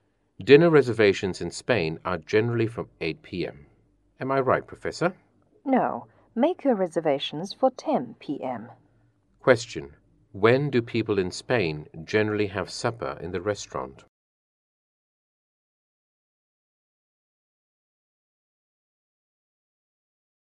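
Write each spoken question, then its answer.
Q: When do people in Spain generally have supper in the restaurant?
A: At 10 p.m.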